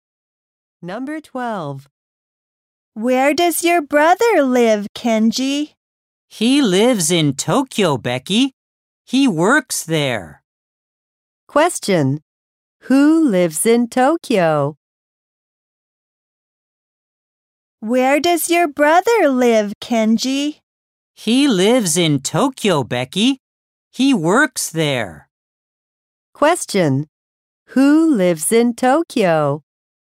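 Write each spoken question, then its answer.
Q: Who lives in Tokyo?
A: Kenji's brother.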